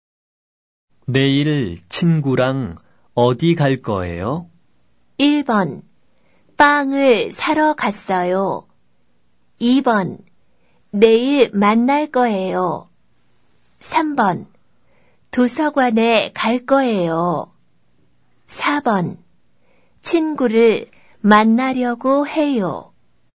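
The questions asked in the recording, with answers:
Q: 내일 친구랑 어디 갈 거예요?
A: 3: 도서관에 갈 거예요.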